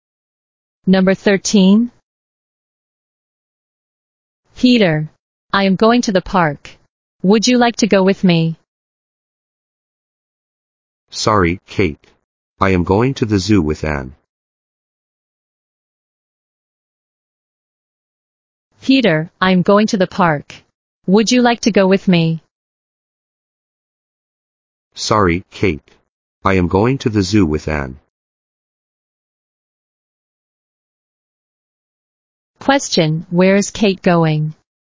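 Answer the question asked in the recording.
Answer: To the park.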